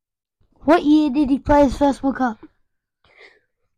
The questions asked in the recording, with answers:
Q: What year did he play his first World Cup?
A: If you are listening correctly, 1982.